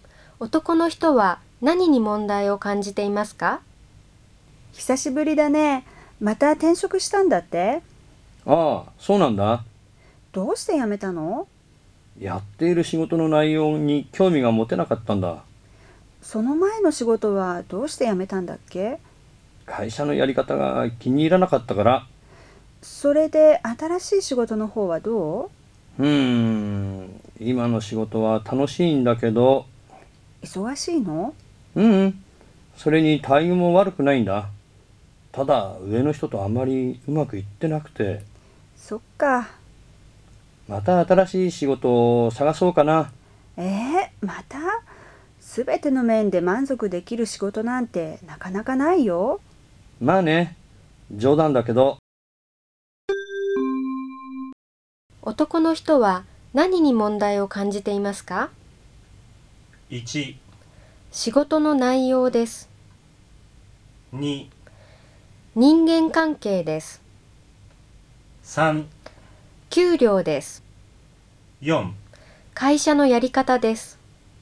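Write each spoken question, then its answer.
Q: 男の人は何に問題を感じていますか?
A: 2: 人間関係です。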